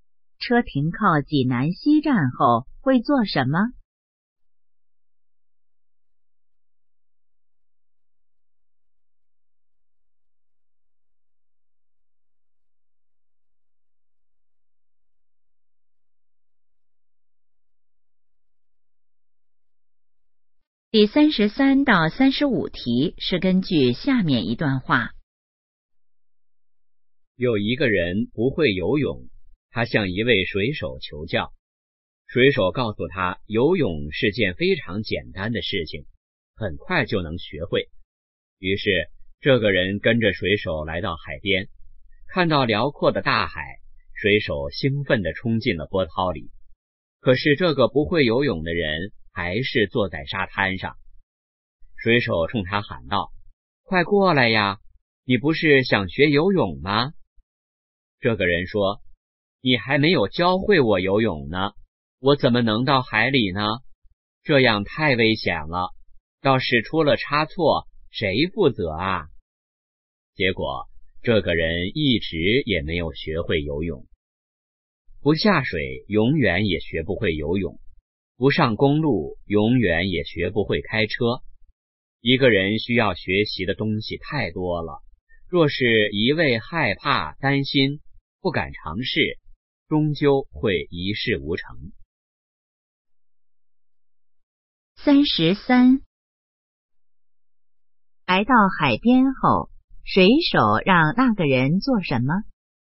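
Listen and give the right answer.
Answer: 下水学游泳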